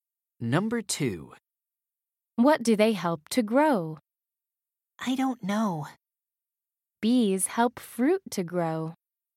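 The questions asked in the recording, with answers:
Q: What do they help to grow?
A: fruit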